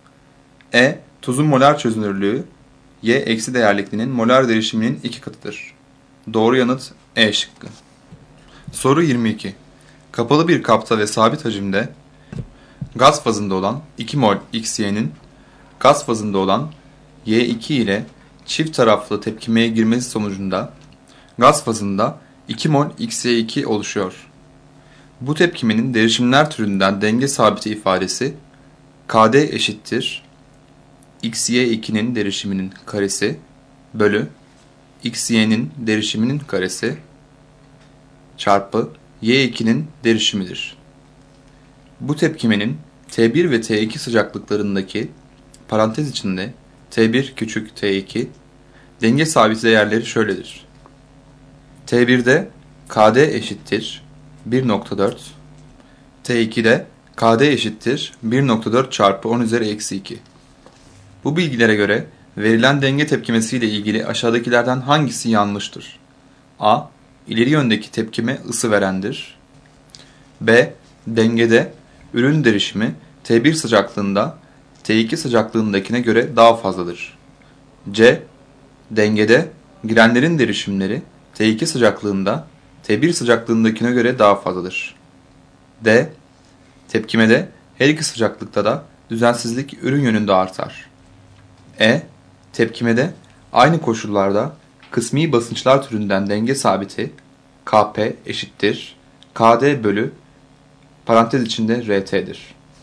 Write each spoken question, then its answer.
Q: Bu bilgilere göre verilen denge tepkimesi ile ilgili aşağıdakilerden hangisi yanlıştır?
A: Doğru yanıt D şıkkı.